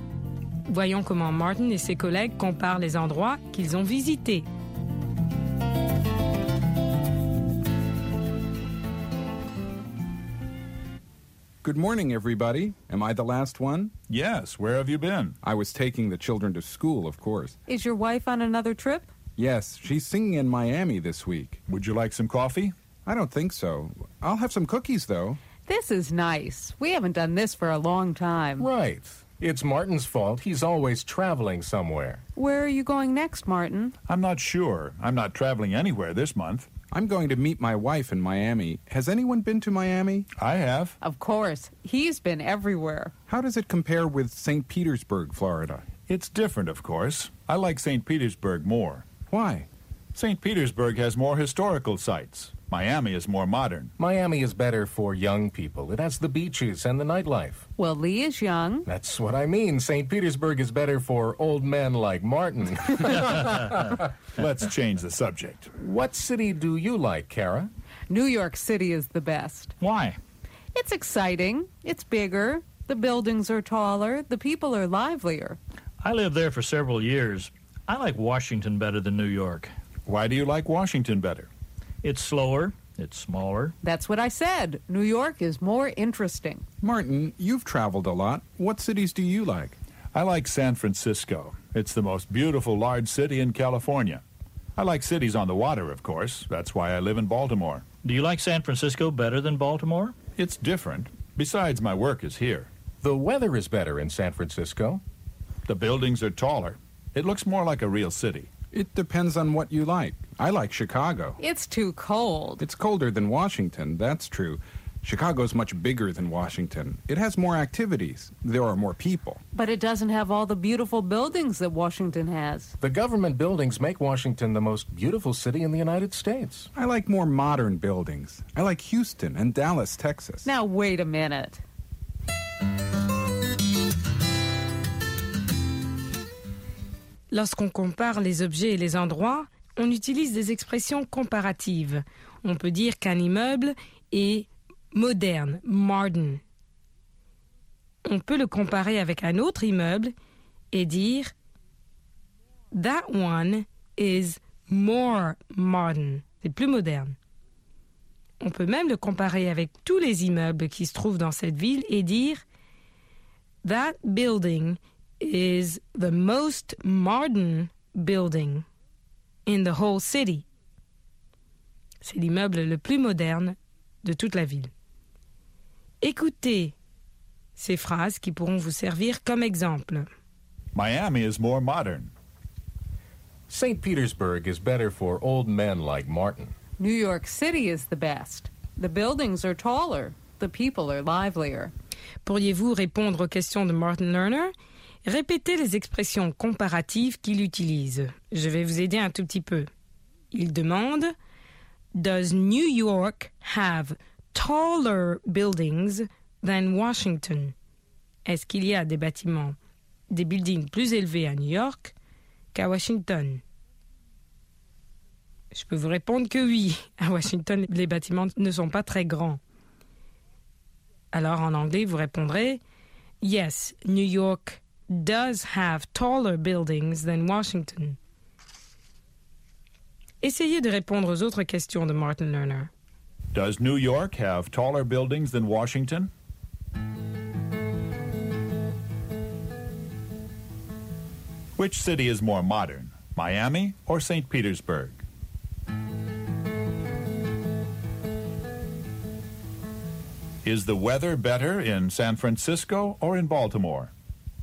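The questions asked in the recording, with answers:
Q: Which city is more modern, Miami or St.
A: Miami

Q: Is the weather better in San Francisco or in Baltimore?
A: In San Francisco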